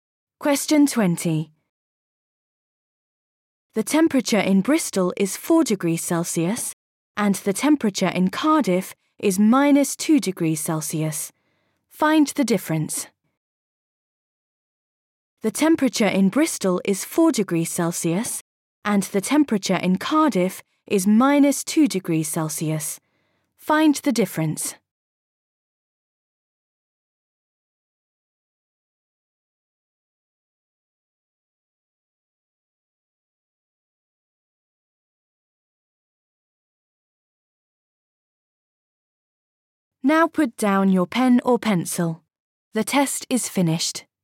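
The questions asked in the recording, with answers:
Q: Find the difference.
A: 6 degrees Celsius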